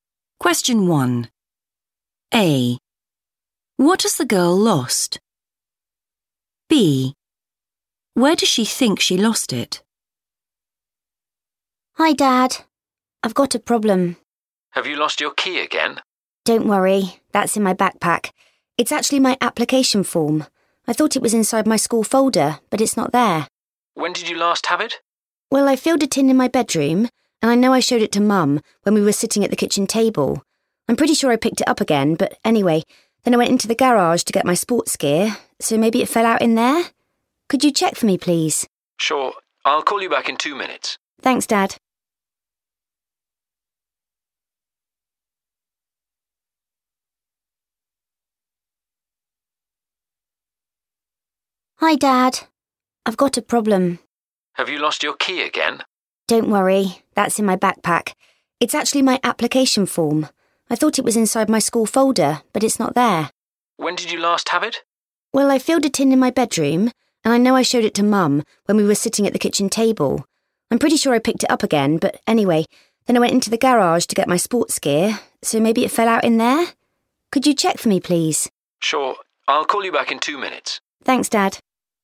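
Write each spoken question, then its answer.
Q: What has the girl lost?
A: her application form

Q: Where does she think she lost it?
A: in the garage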